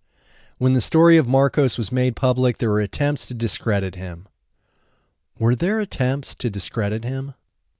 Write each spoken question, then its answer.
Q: Were there attempts to discredit him?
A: Yes, there were attempts to discredit him.